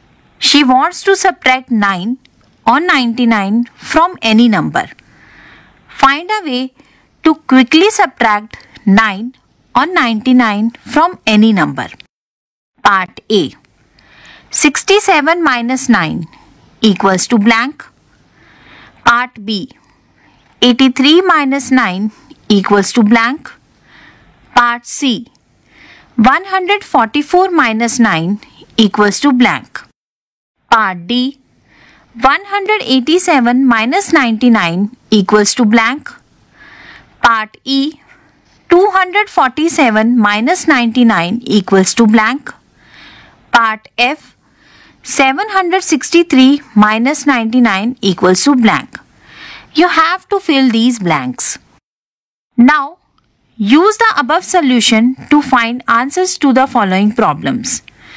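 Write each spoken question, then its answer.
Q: Part A. 67 minus 9 equals to blank.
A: 58

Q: Part B. 83 minus 9 equals to blank.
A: 74

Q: Part C. 144 minus 9 equals to blank.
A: 135

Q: Part D. 187 minus 99 equals to blank.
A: 88

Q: Part E. 247 minus 99 equals to blank.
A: 148

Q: Part F. 763 minus 99 equals to blank.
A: 664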